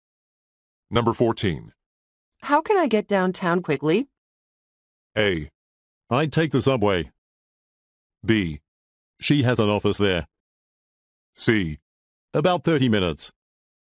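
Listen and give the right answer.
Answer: A: I'd take the subway.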